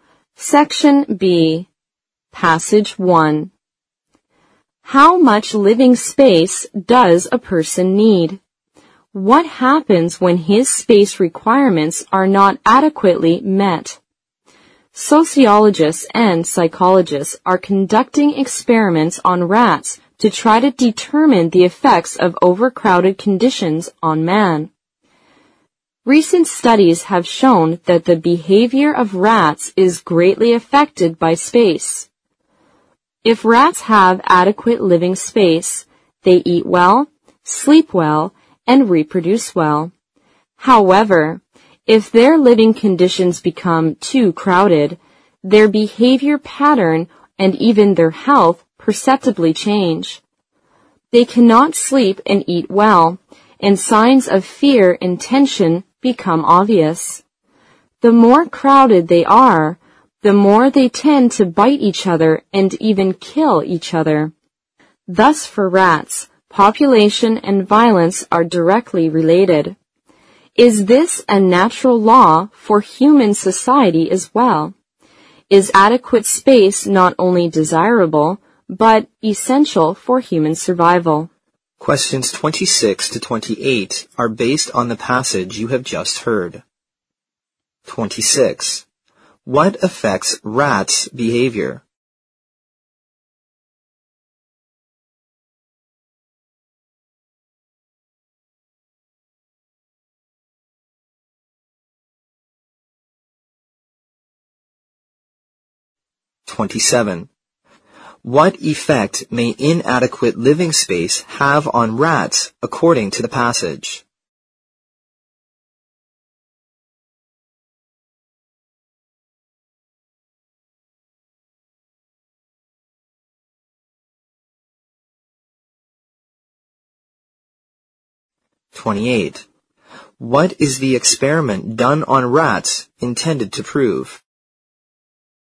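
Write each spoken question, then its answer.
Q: What affects rats' behavior?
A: Living space

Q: What effect may inadequate living space have on rats according to the passage?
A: They cannot eat and sleep well, show fear and tension, and bite or even kill each other

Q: What is the experiment done on rats intended to prove?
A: The effects of overcrowded conditions on man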